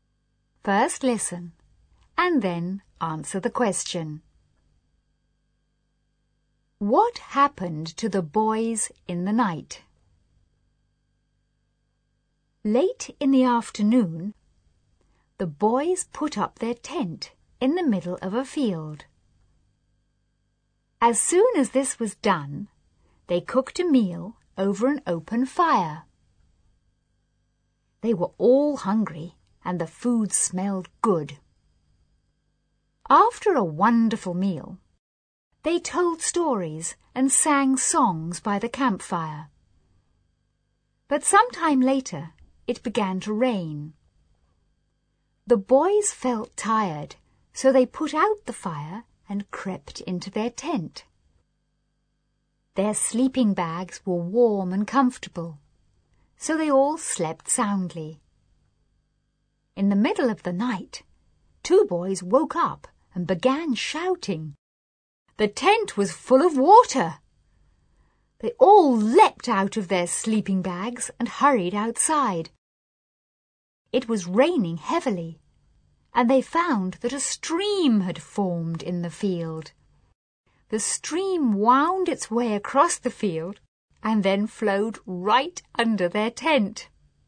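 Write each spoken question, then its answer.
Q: What happened to the boys in the night?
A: A stream formed in the field and flowed under their tent, filling it with water.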